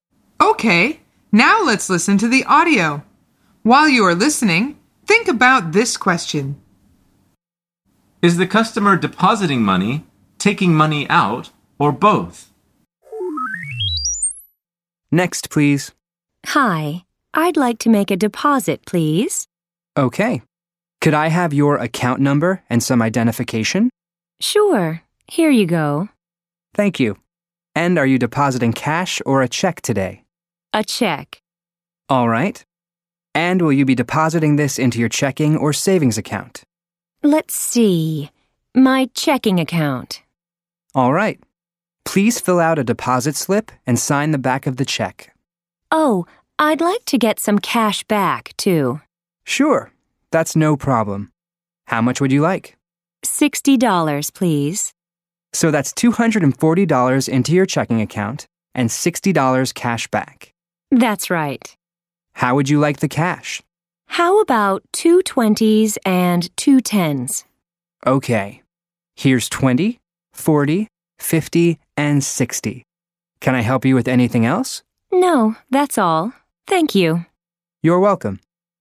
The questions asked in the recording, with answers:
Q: Is the customer depositing money, taking money out, or both?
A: The answer is both.